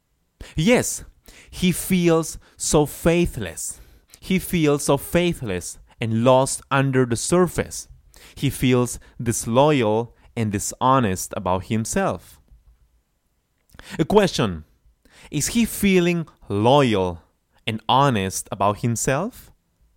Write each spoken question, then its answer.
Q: Is he feeling loyal and honest about himself?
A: No, of course not. Not at all.